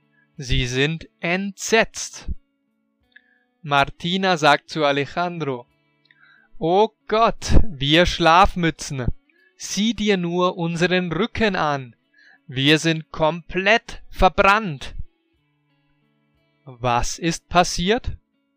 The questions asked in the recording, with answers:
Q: Was ist passiert?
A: Sie sind komplett verbrannt.